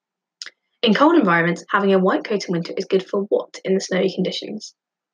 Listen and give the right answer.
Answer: correct answer is it's good for camouflage.